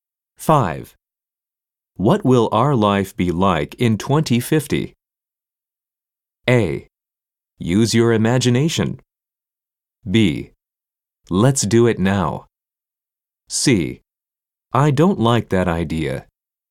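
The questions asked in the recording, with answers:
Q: What will our life be like in 2050?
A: A: Use your imagination.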